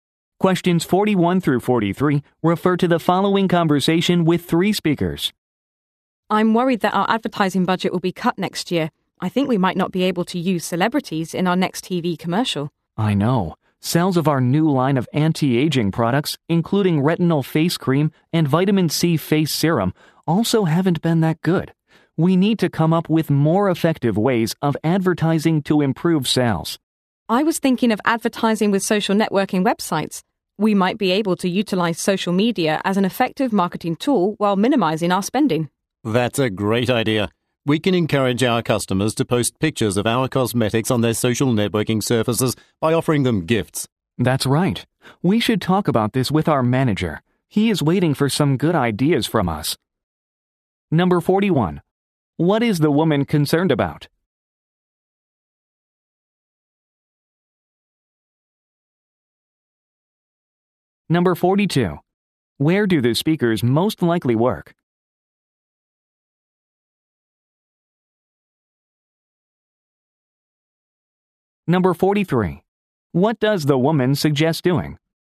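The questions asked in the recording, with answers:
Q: Where do the speakers most likely work?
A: At a cosmetics company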